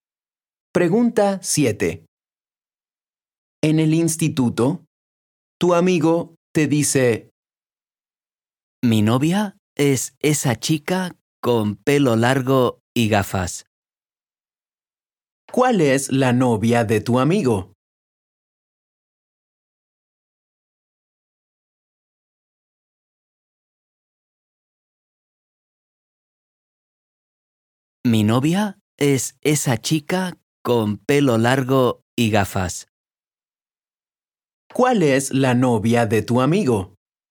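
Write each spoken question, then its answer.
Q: ¿Cuál es la novia de tu amigo?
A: la chica con pelo largo y gafas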